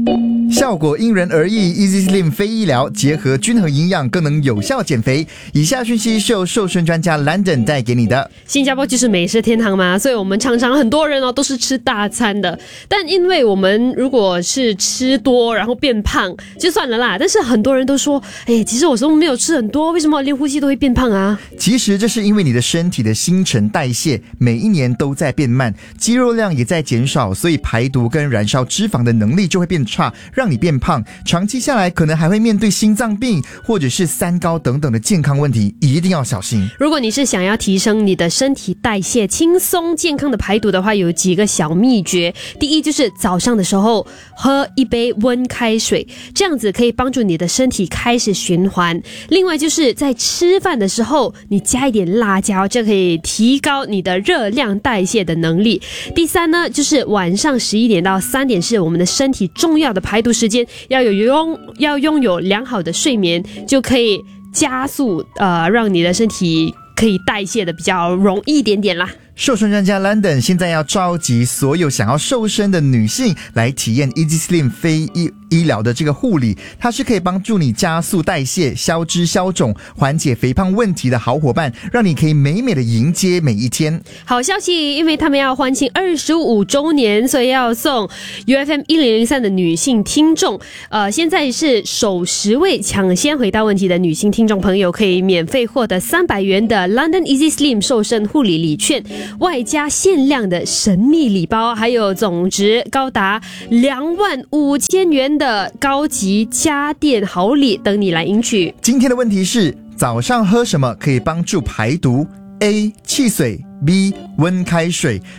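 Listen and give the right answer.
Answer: B: 温开水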